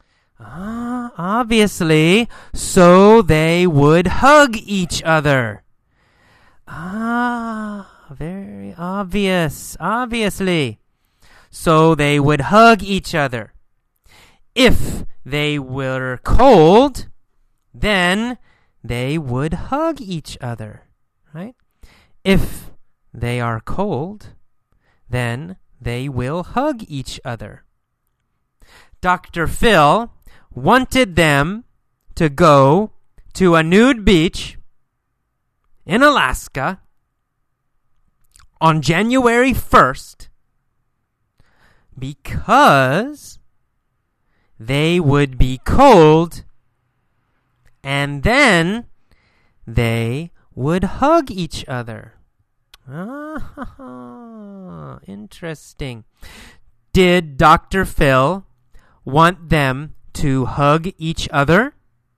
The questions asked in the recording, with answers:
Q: Did Dr. Phil want them to hug each other?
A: Yes. Yes, he did.